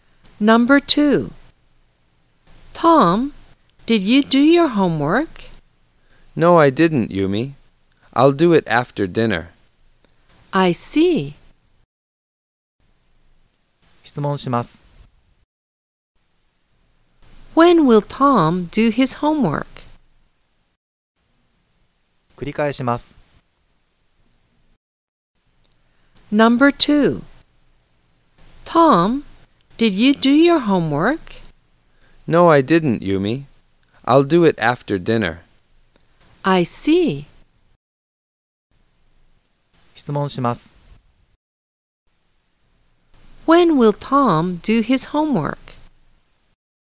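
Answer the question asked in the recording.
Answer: After dinner.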